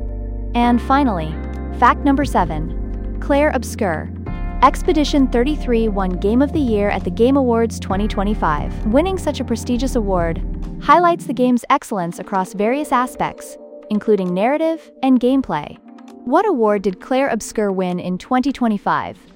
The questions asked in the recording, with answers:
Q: What award did Clair Obscur win in 2025?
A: Correct answer, Game of the Year.